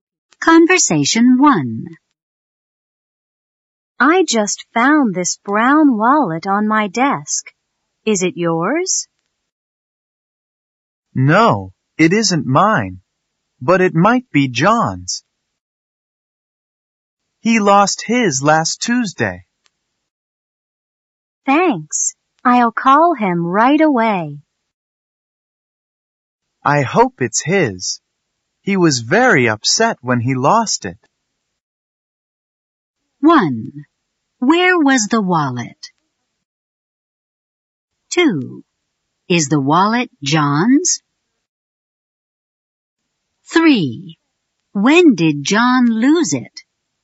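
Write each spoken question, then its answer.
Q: Where was the wallet?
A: On the speaker's desk

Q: When did John lose it?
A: Last Tuesday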